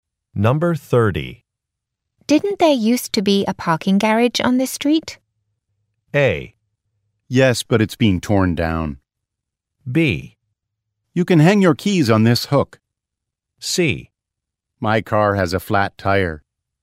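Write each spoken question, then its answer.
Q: Didn't there used to be a parking garage on this street?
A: A: Yes, but it's being torn down.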